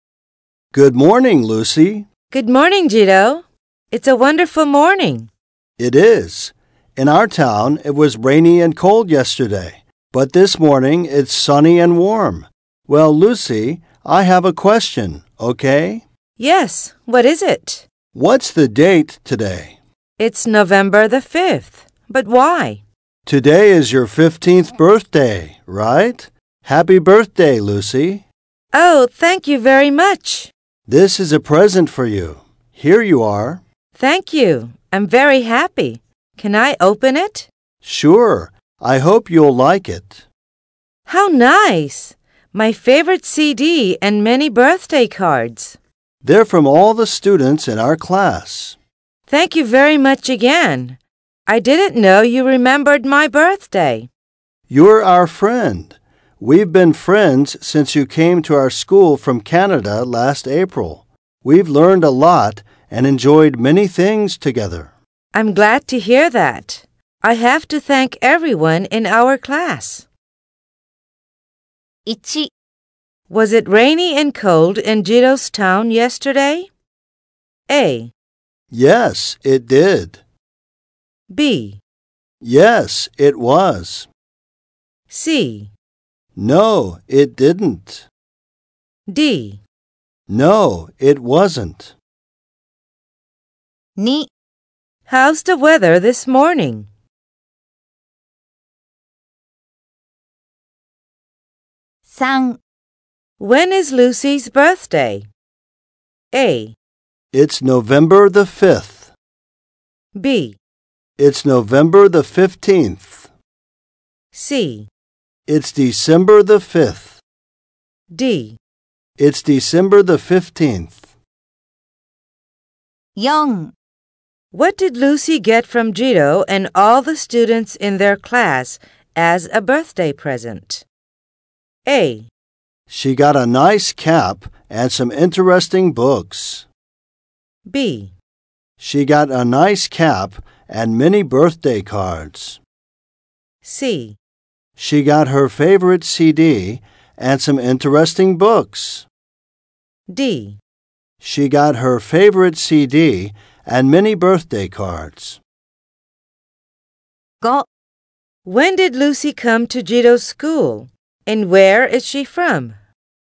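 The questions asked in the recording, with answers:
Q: Was it rainy and cold in Jiro's town yesterday?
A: B: Yes, it was.

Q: How's the weather this morning?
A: It's sunny and warm.

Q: When is Lucy's birthday?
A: A: It's November the 5th.

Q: What did Lucy get from Jiro and all the students in their class as a birthday present?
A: D: She got her favorite CD and many birthday cards.

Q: When did Lucy come to Jiro's school? And where is she from?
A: She came last April. She is from Canada.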